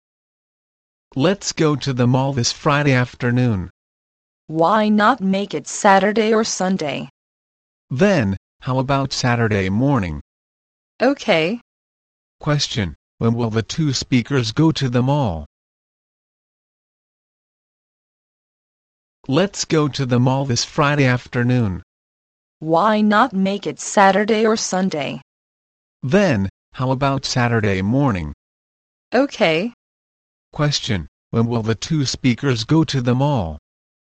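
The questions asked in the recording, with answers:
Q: Question: When will the two speakers go to the mall?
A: On Saturday morning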